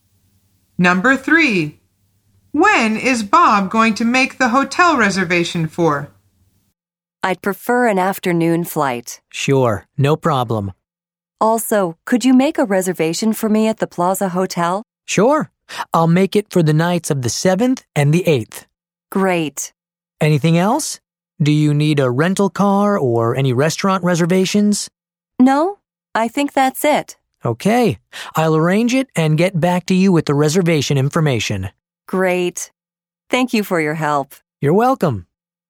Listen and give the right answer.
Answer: The answer is the 7th and 8th.